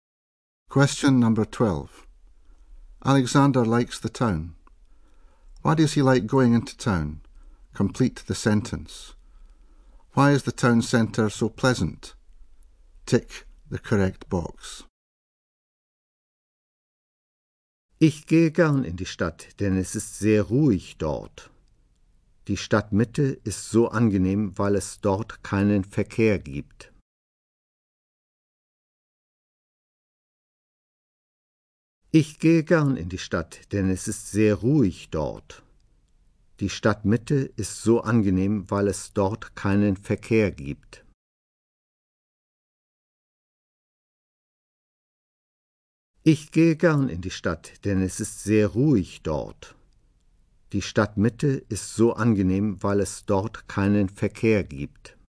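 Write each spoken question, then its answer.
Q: Why does he like going into town?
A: It is very quiet there

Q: Why is the town centre so pleasant?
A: There is no traffic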